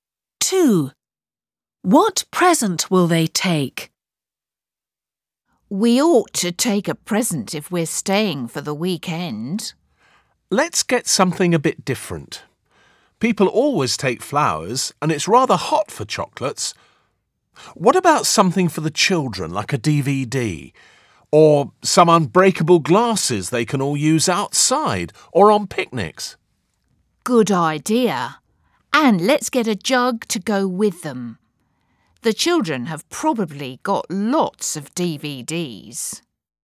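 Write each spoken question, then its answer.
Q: What present will they take?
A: unbreakable glasses and a jug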